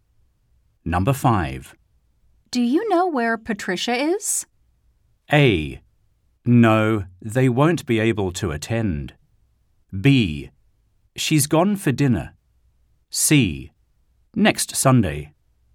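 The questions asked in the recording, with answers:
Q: Do you know where Patricia is?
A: B: She's gone for dinner.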